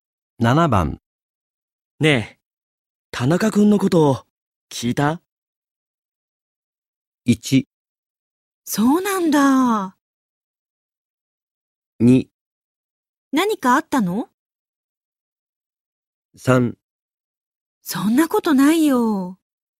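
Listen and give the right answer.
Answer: 2: 何かあったの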